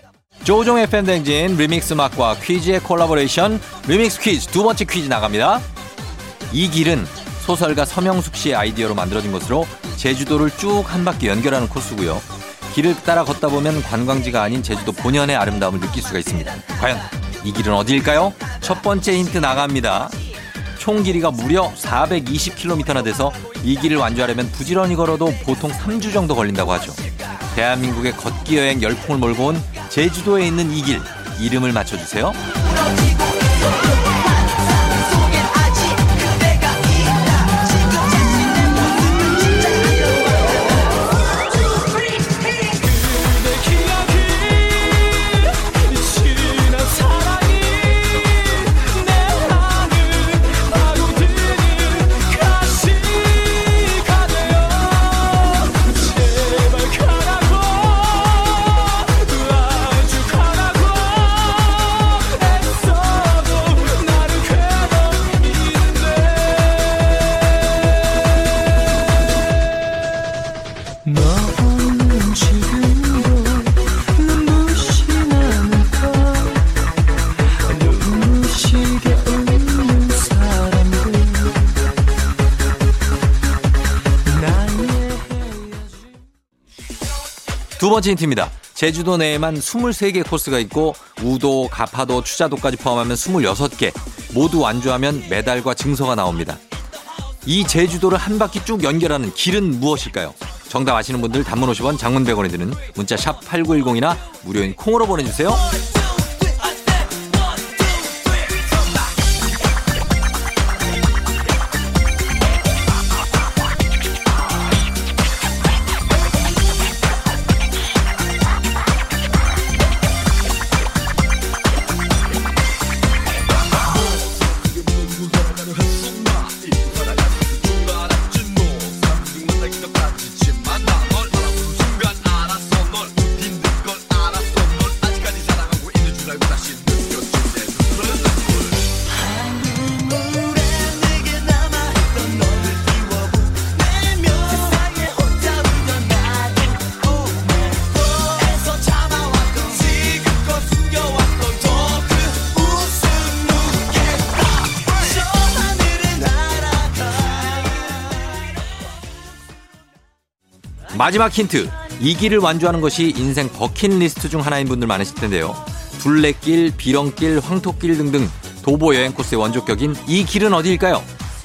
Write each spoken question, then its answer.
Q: 둘레길, 비렁길, 황토길 등등 도보 여행 코스의 원조격인 이 길은 어디일까요?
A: 바로 정답은 두구두구두구두구두구두구두구두구 올레길입니다.